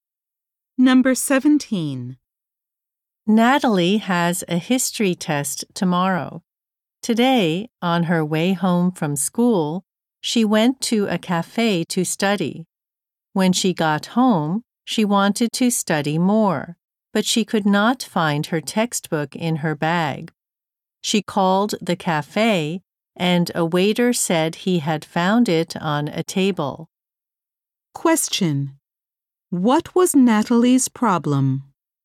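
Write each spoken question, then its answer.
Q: What was Natalie's problem?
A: She left her textbook at the cafe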